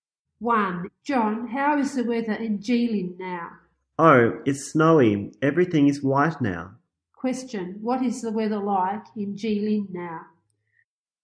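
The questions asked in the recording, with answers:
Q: Question, what is the weather like in Jilin now?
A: It's snowy.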